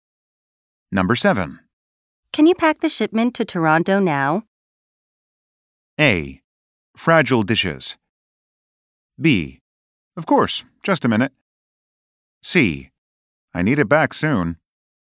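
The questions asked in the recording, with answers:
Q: Can you pack the shipment to Toronto now?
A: B: Of course, just a minute.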